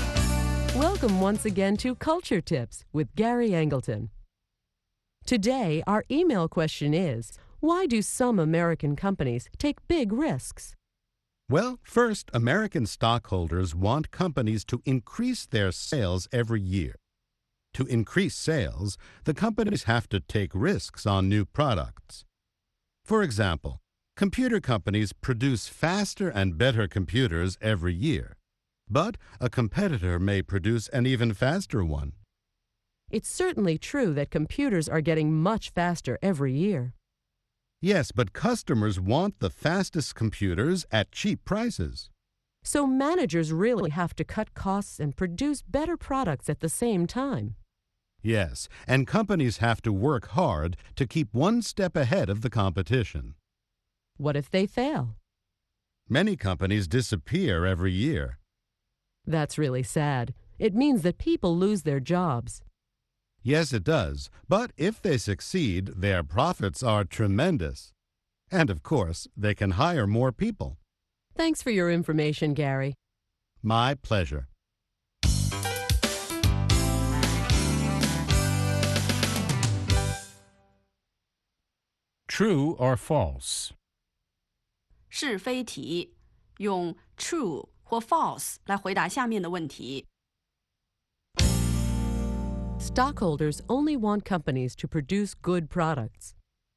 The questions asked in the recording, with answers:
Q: Stockholders only want companies to produce good products.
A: False. They also want the company to increase sales and make big profits.